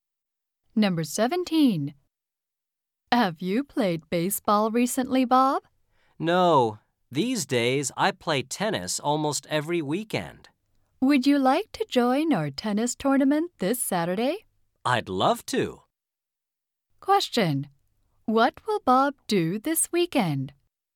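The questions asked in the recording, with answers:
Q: What will Bob do this weekend?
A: Join a tennis tournament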